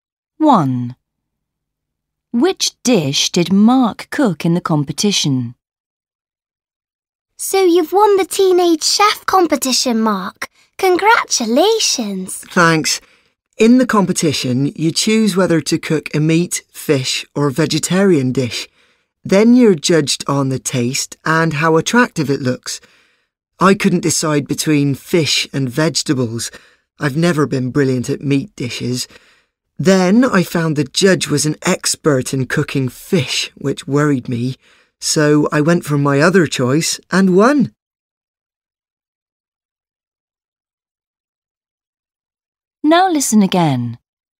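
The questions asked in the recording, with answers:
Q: Which dish did Mark cook in the competition?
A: a vegetarian dish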